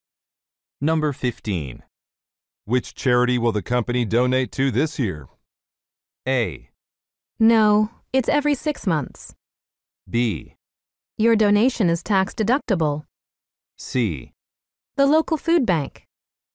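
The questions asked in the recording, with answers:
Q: Which charity will the company donate to this year?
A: C: The local food bank.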